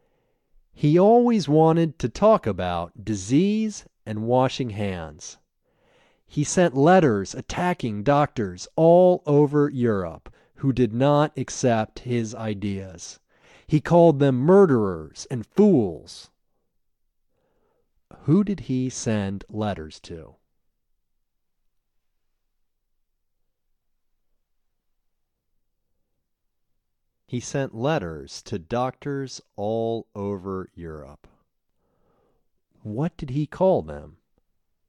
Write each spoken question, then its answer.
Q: What did he call them?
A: He called them murderers and fools.